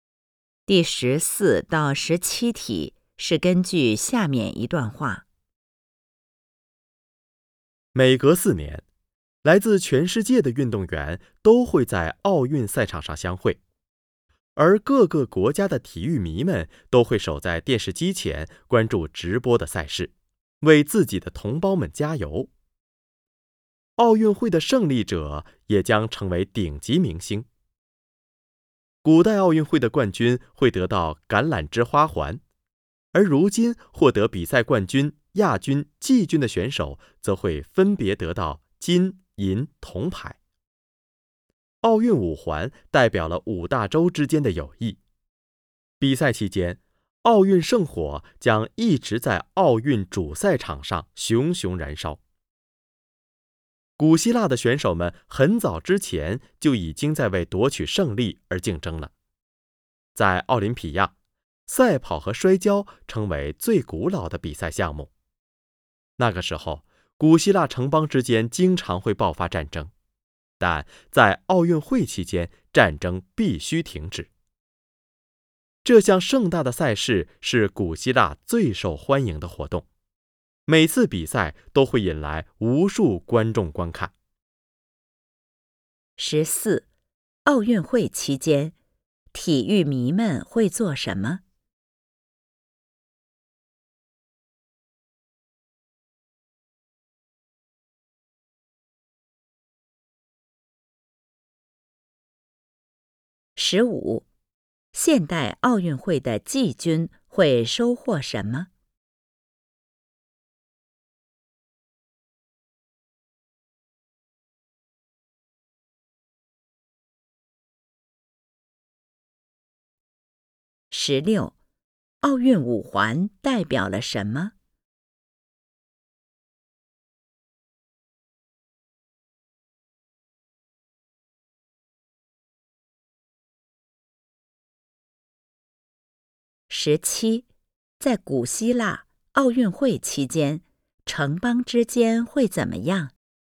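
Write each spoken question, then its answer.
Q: 奥运会期间,体育迷们会做什 么?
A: 守在电视机前关注直播赛事,为同胞加油

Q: 现代奥运会的季军会收获什么?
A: 铜牌

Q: 奥运五环代表了什么?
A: 五大洲之间的友谊

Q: 在古希腊奥运会期间,城邦之间会怎么样?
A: 停止战争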